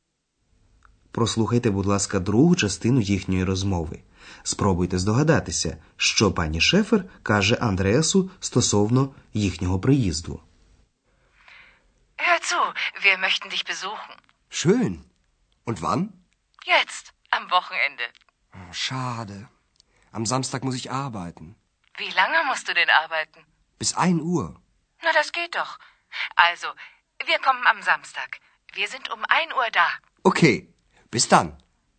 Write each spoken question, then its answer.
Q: Спробуйте здогадатися, що пані Шефер каже Андреасу стосовно їхнього приїзду.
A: Отже, пані Шефер каже, що в суботу о 1-й годині вони приїдуть до Андреаса в готель.